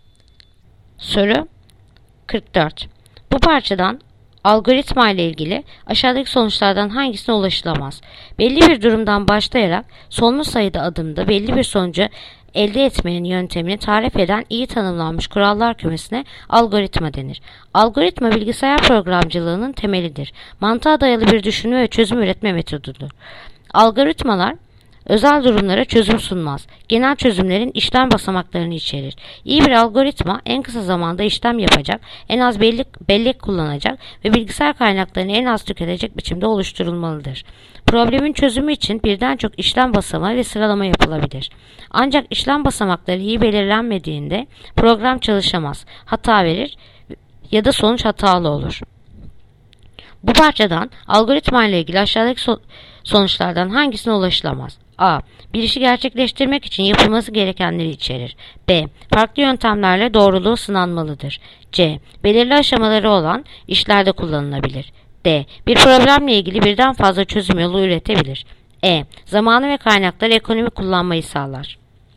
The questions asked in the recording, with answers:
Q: Bu parçadan algoritma ile ilgili aşağıdaki sonuçlardan hangisine ulaşılamaz?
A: Yanıt: Bursa. Farklı yöntemlerle doğruluğu sınanmalıdır.